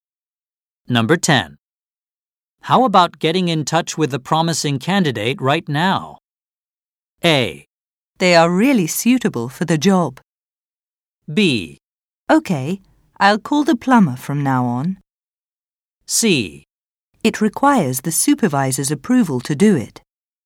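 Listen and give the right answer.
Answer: C: It requires the supervisor's approval to do it.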